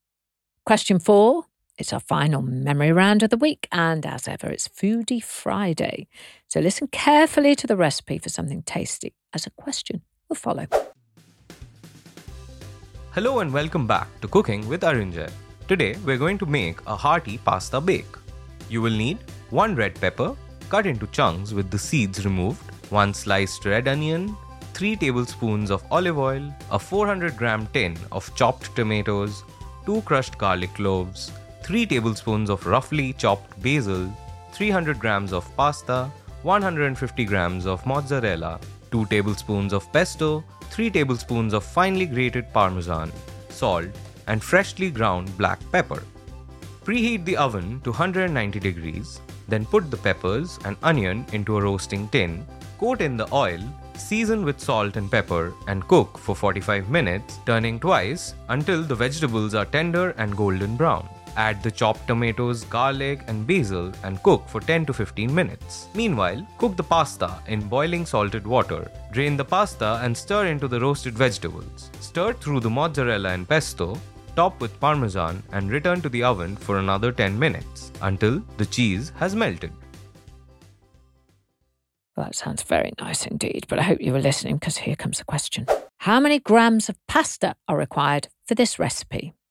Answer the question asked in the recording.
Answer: And the answer was 300 grams of pasta.